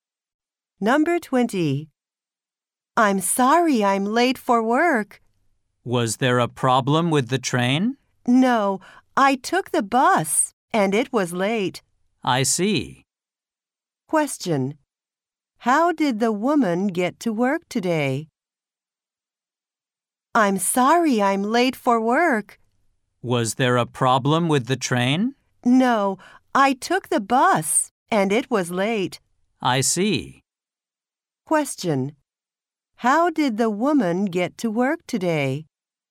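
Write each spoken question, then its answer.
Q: How did the woman get to work today?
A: By bus.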